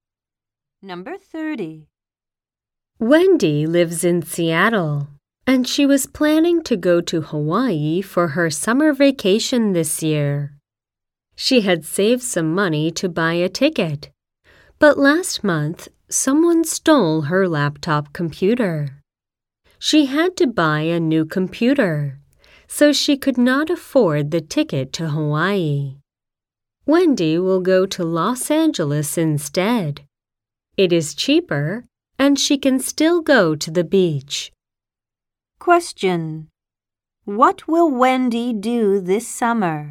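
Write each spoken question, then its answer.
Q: What will Wendy do this summer?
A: Go to Los Angeles.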